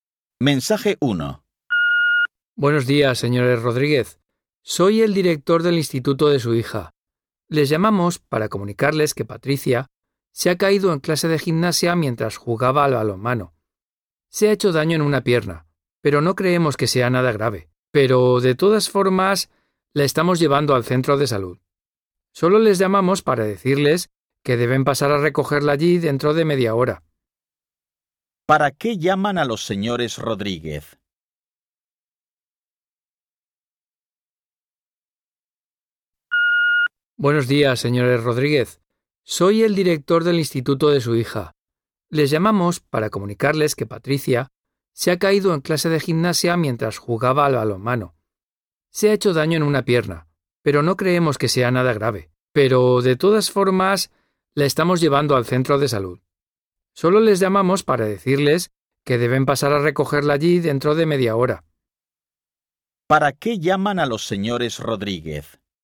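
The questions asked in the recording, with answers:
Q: ¿Para qué llaman a los señores Rodríguez?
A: Para que recojan a su hija en el centro de salud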